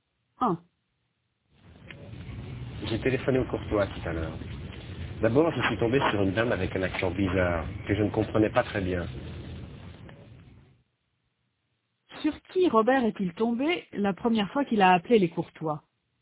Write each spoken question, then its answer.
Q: Sur qui Robert est-il tombé la première fois qu'il a appelé les Courtois?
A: Sur une dame avec un accent bizarre.